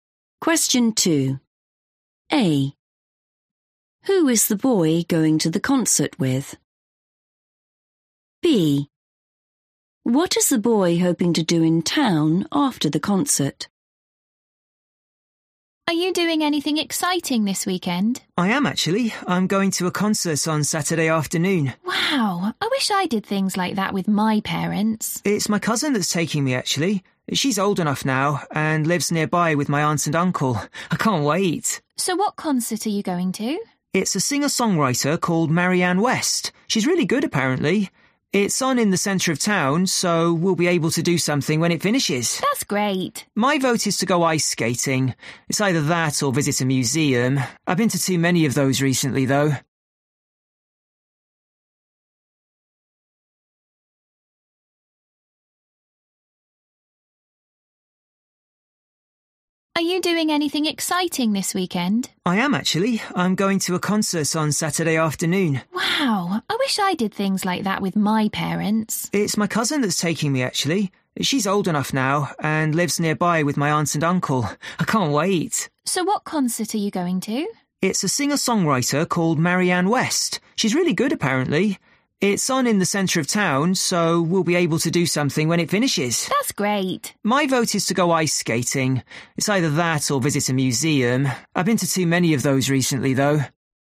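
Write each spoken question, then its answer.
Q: Who is the boy going to the concert with?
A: his cousin

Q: What is the boy hoping to do in town after the concert?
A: go ice skating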